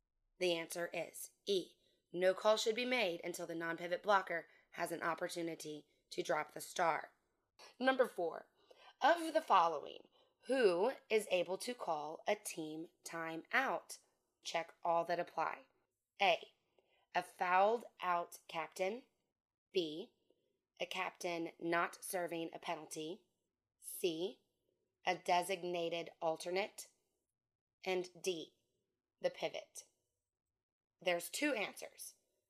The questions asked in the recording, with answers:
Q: of the following, who is able to call a team timeout?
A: A captain who is not serving a penalty and a designated alternate.